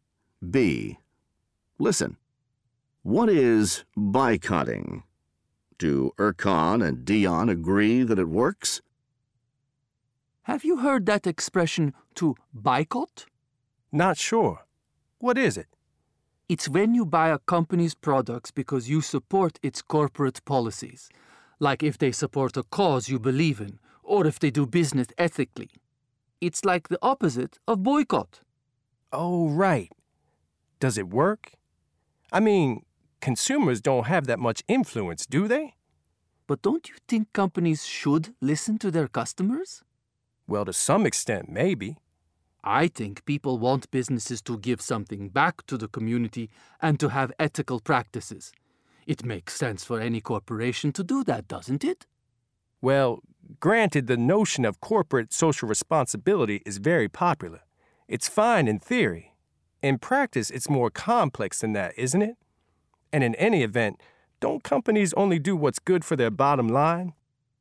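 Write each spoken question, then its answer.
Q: Do Erkan and Dion agree that it works?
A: No, they don't agree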